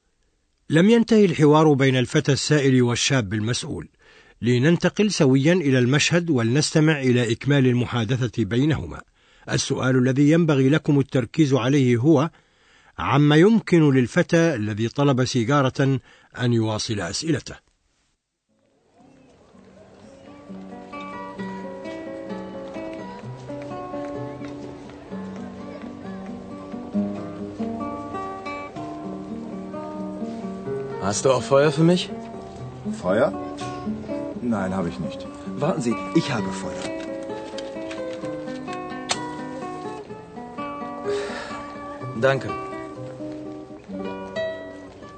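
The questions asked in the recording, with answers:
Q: عما يمكن للفتى الذي طلب سيجارة أن يواصل أسئلته.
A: يطلب نارًا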